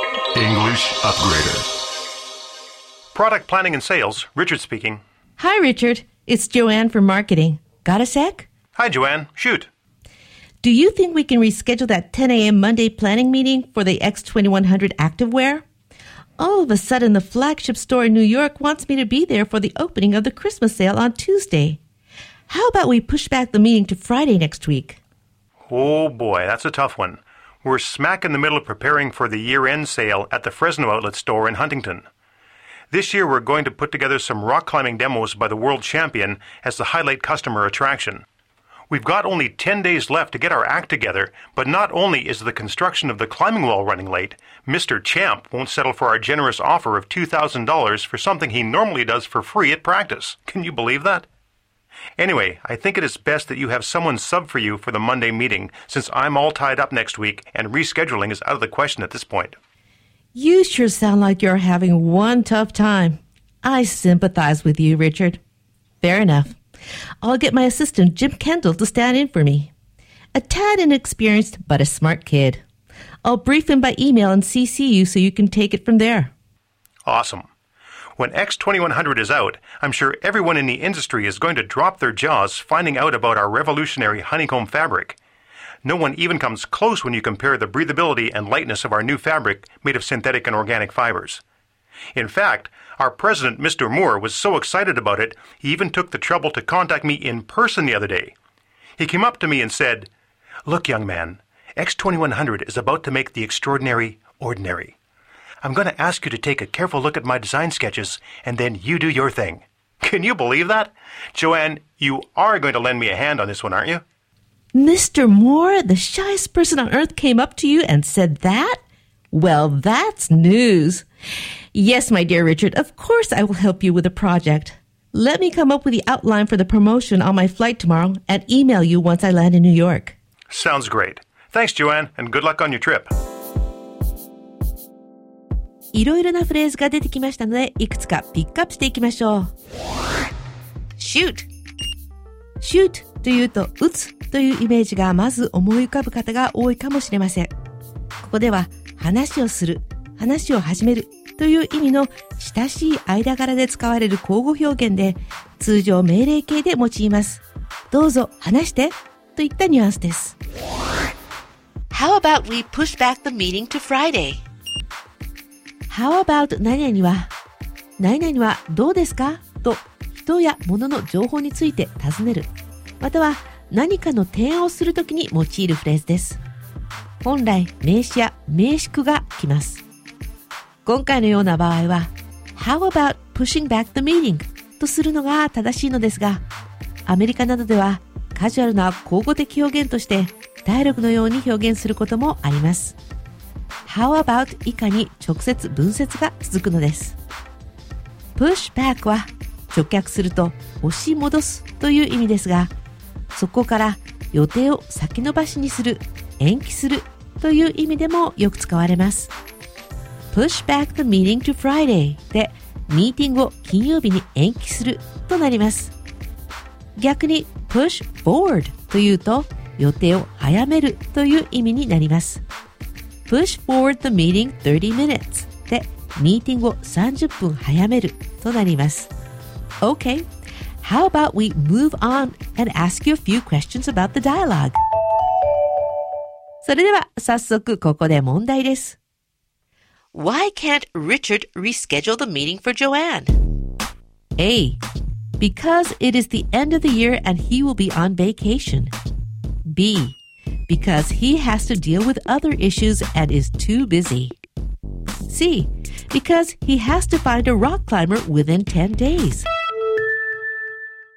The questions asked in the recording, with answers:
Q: Why can't Richard reschedule the meeting for Joanne?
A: B は他に処理しなければならない案件があり、あまりに忙しいから。